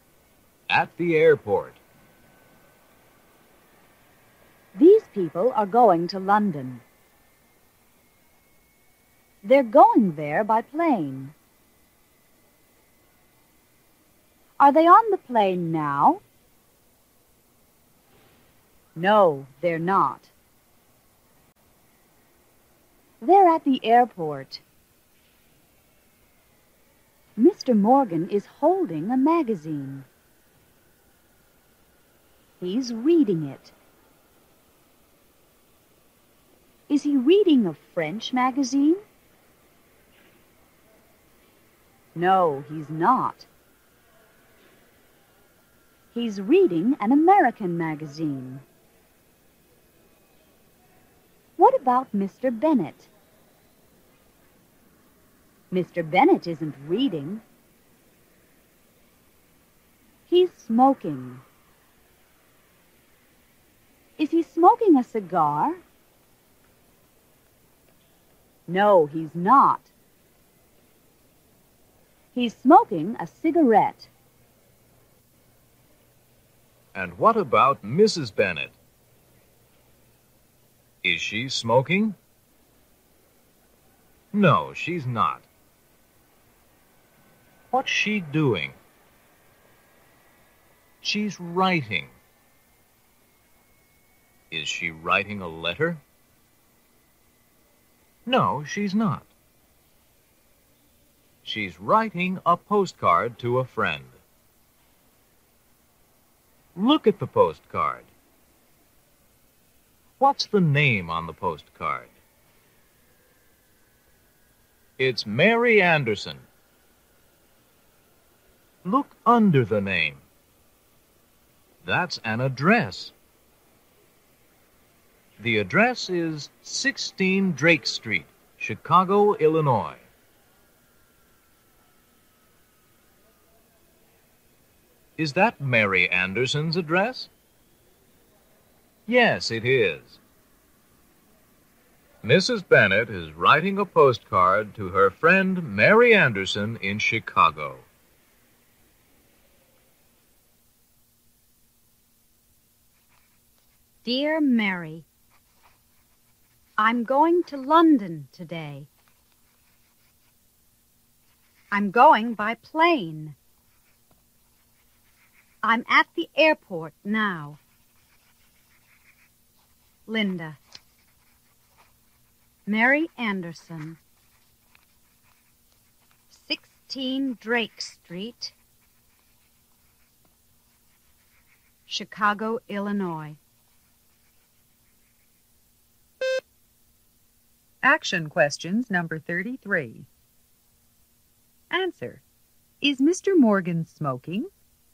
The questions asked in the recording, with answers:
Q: Is Mr. Morgan smoking?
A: No, he's not.